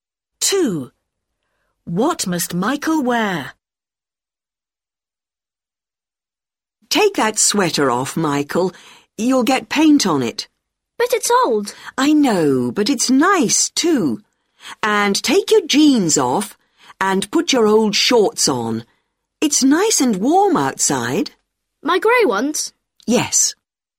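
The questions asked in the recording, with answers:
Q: What must Michael wear?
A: his old grey shorts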